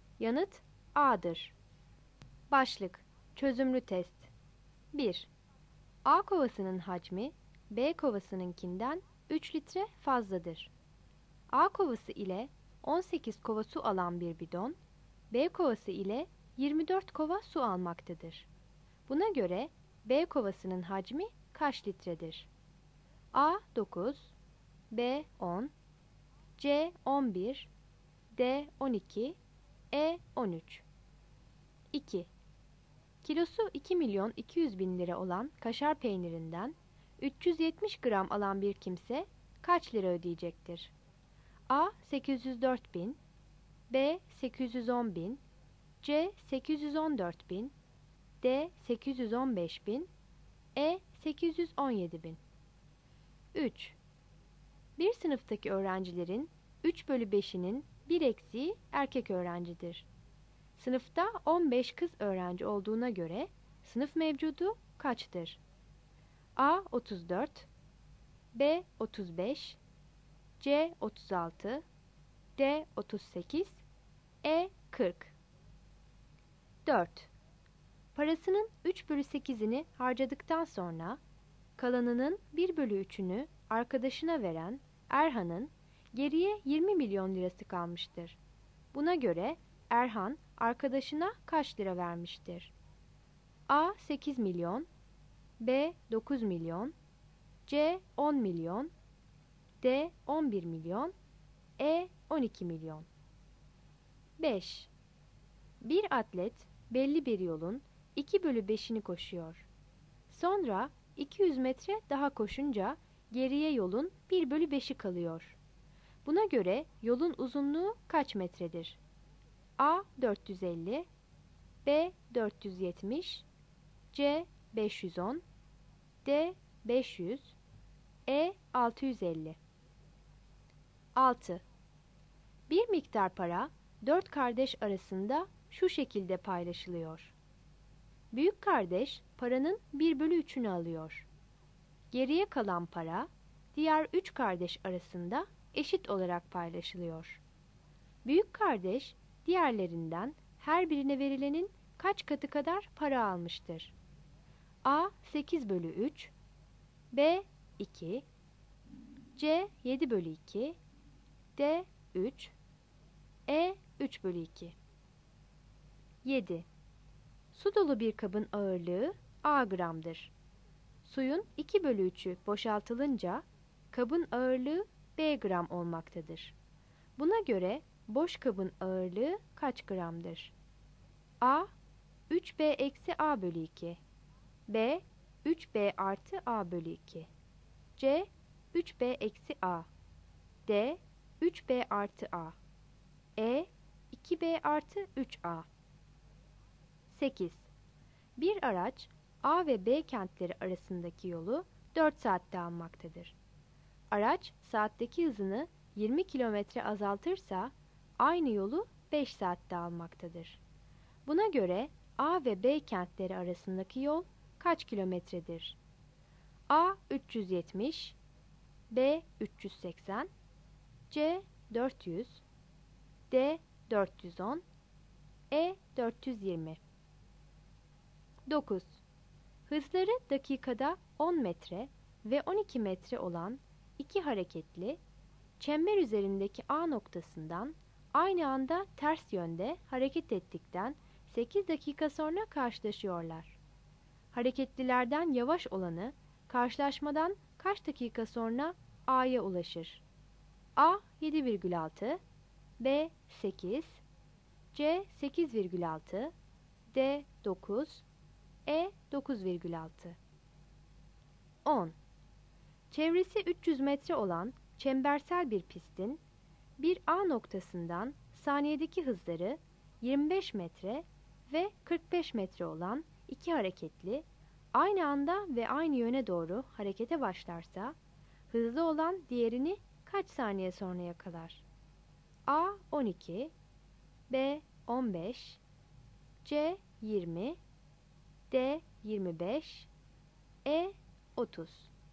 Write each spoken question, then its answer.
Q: Buna göre B kovasının hacmi kaç litredir?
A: Yanıt A'dır.

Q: Kilosu 2 milyon 200 bin lira olan kaşar peynirinden 370 gram alan bir kimse kaç lira ödeyecektir?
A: Yanıt C'dir.

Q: Sınıfta 15 kız öğrenci olduğuna göre sınıf mevcudu kaçtır?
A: Yanıt B'dir.

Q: Buna göre Erhan arkadaşına kaç lira vermiştir?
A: Yanıt C'dir.

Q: Buna göre yolun uzunluğu kaç metredir?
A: Yanıt D'dir.

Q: Büyük kardeş diğerlerinden her birine verilenin kaç katı kadar para almıştır?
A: Yanıt E'dir.

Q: Buna göre boş kabın ağırlığı kaç gramdır?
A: Yanıt a'dır.

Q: Buna göre A ve B kentleri arasındaki yol kaç kilometredir?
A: Yanıt C'dir.

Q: Hareketlilerden yavaş olanı karşılaşmadan kaç dakika sonra A'ya ulaşır?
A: Yanıt E'dir.

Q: Çevresi 300 metre olan çembersel bir pistin bir A noktasından saniyedeki hızları 25 metre ve 45 metre olan iki hareketli aynı anda ve aynı yöne doğru harekete başlarsa hızlı olan diğerini kaç saniye sonra yakalar?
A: Yanıt B'dir.